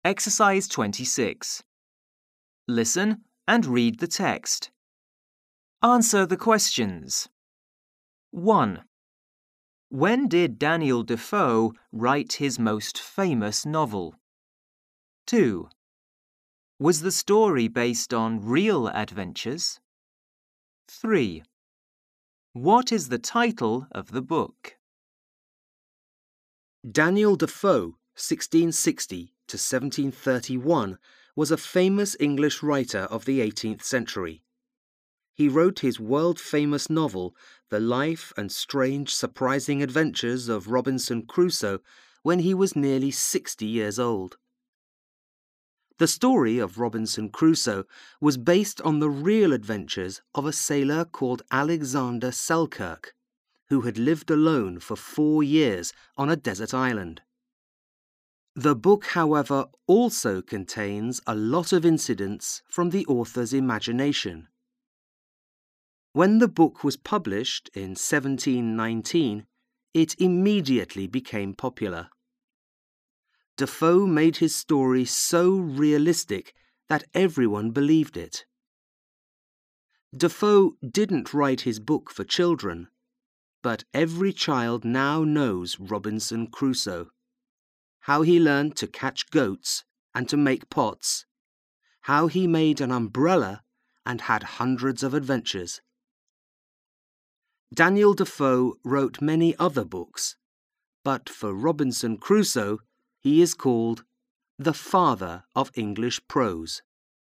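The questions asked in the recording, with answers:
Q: When did Daniel Defoe write his most famous novel?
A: When he was nearly 60 years old (published in 1719)

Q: Was the story based on real adventures?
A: Yes, on the real adventures of the sailor Alexander Selkirk

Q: What is the title of the book?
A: The Life and Strange Surprising Adventures of Robinson Crusoe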